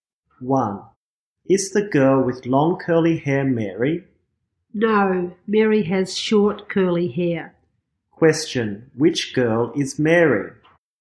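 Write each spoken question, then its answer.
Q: Question, which girl is Mary?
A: The girl with short curly hair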